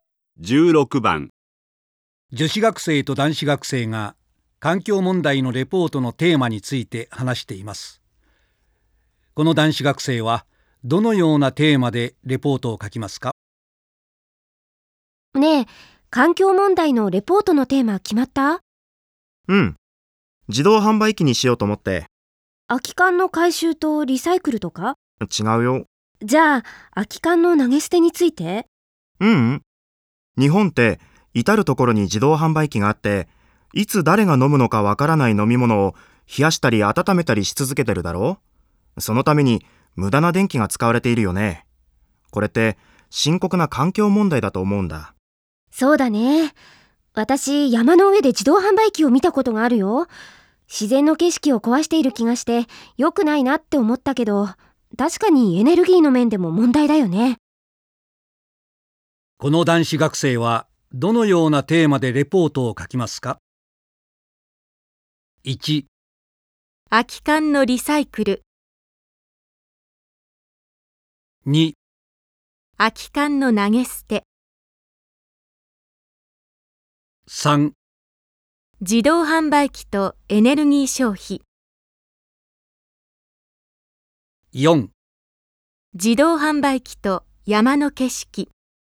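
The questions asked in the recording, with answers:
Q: この男子学生はどのようなテーマでレポートを書きますか?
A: 3: 自動販売機とエネルギー消費。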